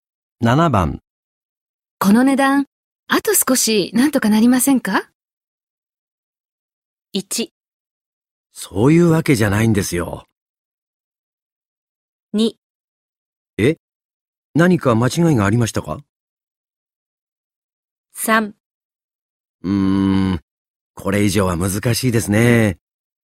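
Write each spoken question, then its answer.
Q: この値段、あと少しなんとかなりませんか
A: 3: うーん、これ以上は難しいですね。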